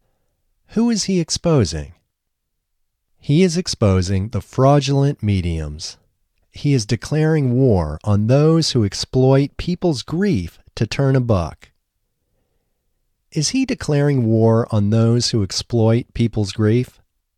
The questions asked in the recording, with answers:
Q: Is he declaring war on those who exploit people's grief?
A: Yes, he is declaring war on those who exploit people's grief.